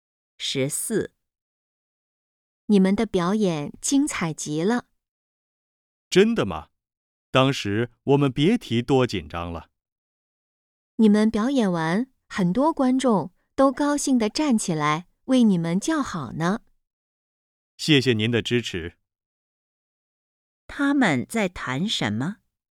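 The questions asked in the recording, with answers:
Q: 他们在谈什么?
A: 表演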